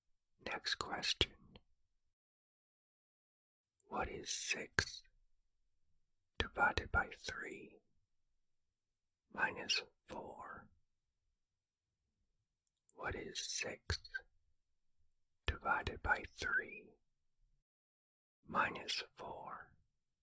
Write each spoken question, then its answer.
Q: What is 6 divided by 3 minus 4?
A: The answer is negative 2.